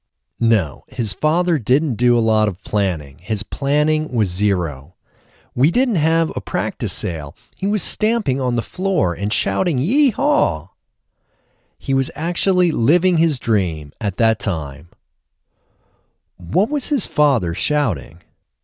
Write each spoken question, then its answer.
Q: What was his father shouting?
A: His father was shouting, "Yee-haw!"